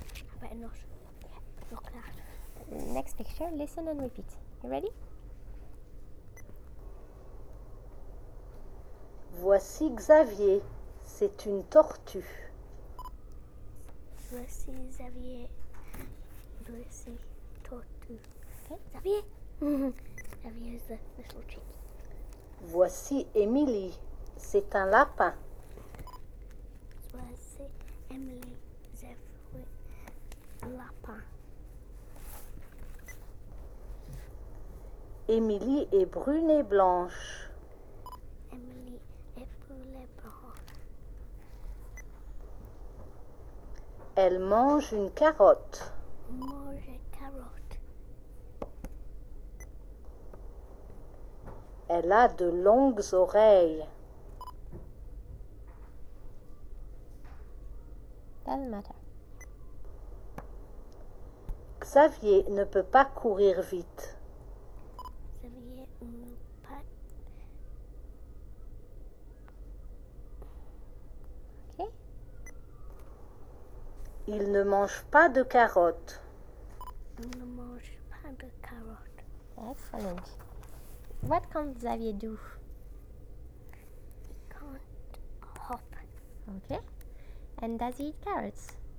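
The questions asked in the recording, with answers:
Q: And does he eat carrots?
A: No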